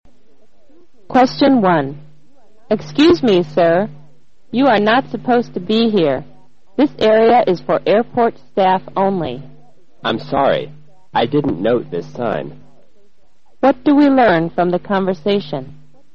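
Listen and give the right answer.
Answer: The man went into an area for airport staff only because he didn't notice the sign.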